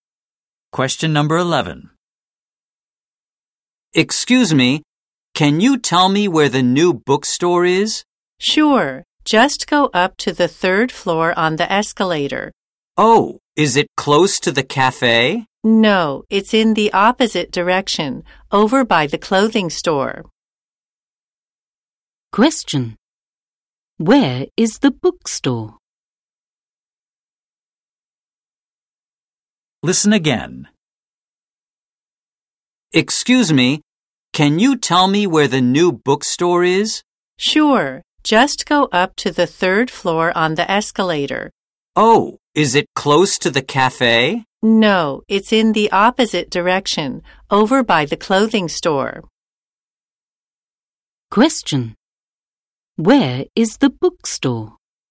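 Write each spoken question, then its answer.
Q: Where is the bookstore?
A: On the third floor, next to the clothing store, on the opposite side from the cafe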